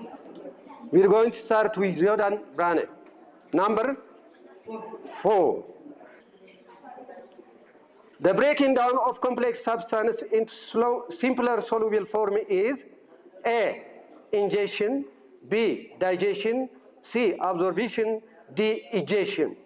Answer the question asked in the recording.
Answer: B, digestion.